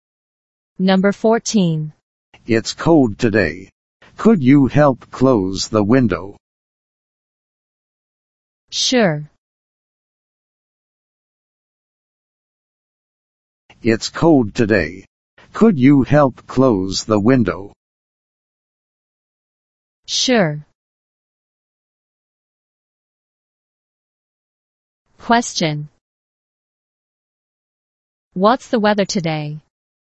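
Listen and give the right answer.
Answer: It's cold.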